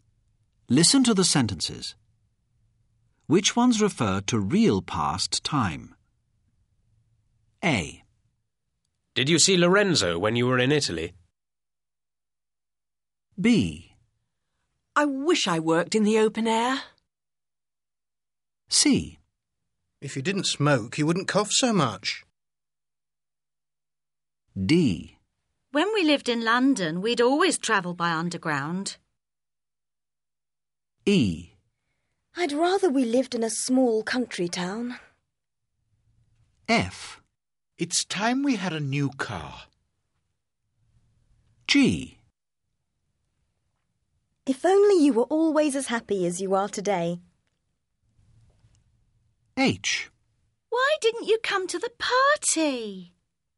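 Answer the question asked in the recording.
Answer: A, D, H: Did you see Lorenzo when you were in Italy?; When we lived in London, we'd always travel by underground.; Why didn't you come to the party?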